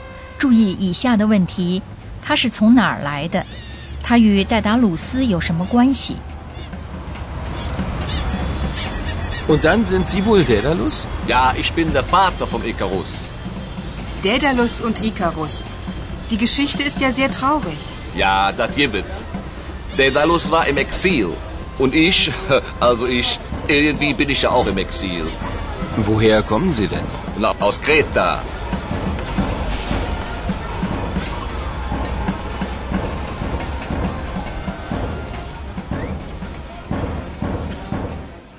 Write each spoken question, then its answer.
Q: 他是从哪儿来的?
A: 他是从克里特来的,至少他是这么说的。